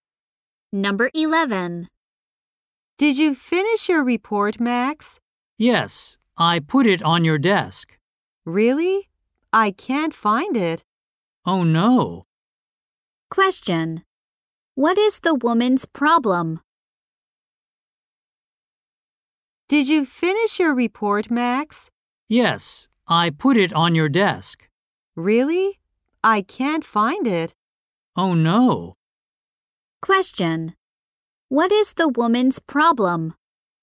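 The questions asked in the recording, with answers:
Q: What is the woman's problem?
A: She can't find Max's report.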